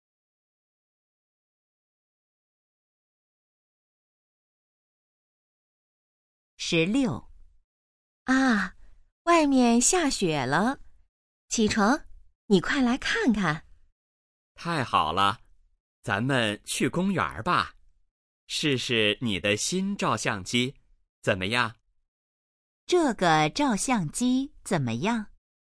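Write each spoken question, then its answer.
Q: 这个照相机怎么样?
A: 是新的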